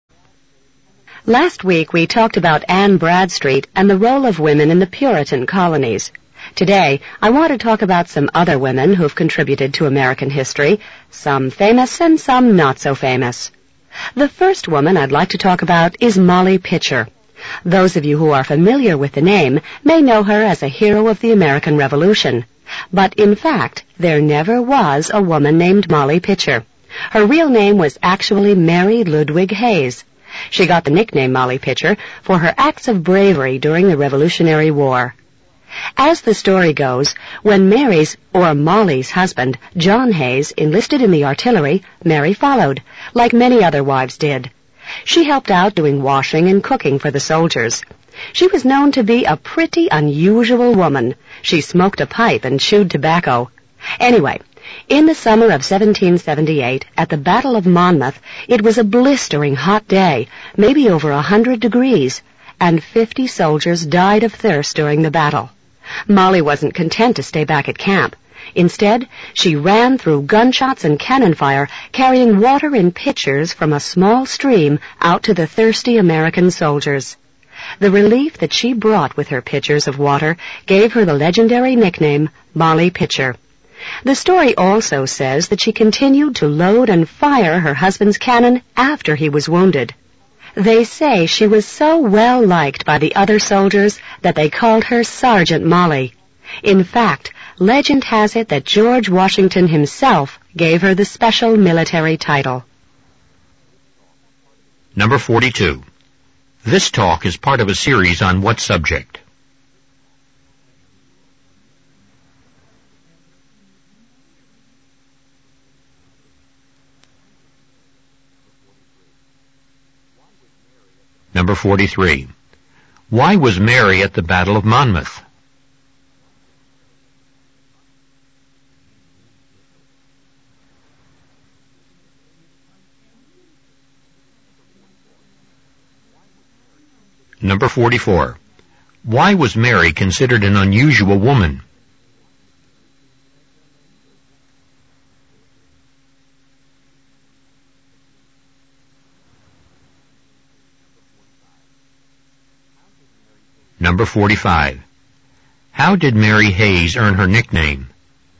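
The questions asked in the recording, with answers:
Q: This talk is part of a series on what subject?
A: Women in American history

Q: Why was Mary at the Battle of Monmouth?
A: She followed her husband, who enlisted in the artillery

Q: Why was Mary considered an unusual woman?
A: She smoked a pipe and chewed tobacco

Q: How did Mary Hayes earn her nickname?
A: By carrying pitchers of water to thirsty soldiers during the battle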